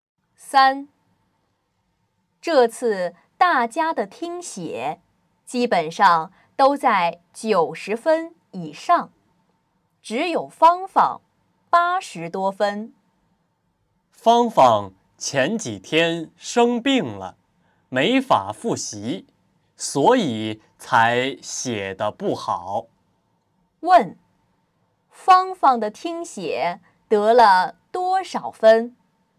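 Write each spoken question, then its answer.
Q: 问,芳芳的听写得了多少分?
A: 80多分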